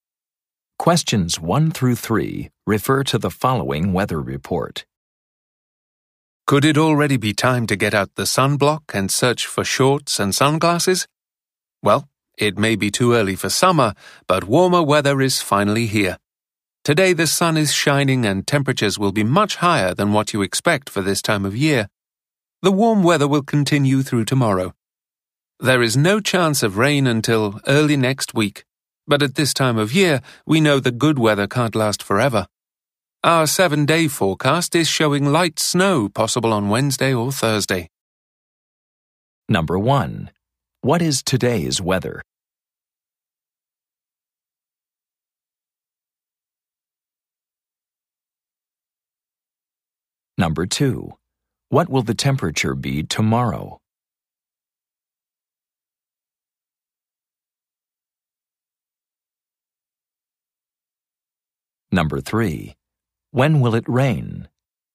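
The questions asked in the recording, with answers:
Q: What is today's weather?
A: Sunny and warm

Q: What will the temperature be tomorrow?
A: Warm

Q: When will it rain?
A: Early next week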